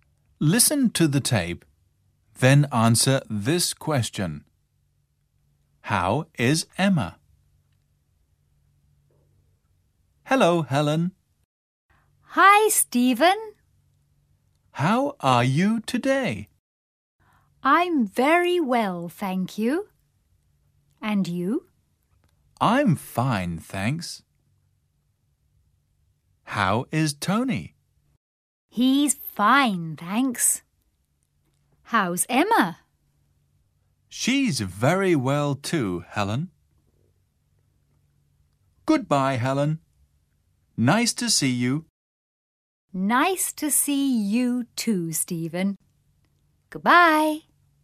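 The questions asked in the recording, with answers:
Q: How is Emma?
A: She's very well.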